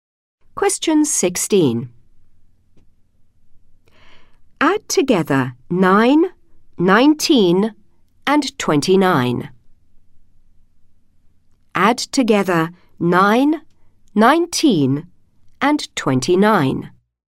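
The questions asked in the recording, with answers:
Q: Add together 9, 19 and 29.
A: 57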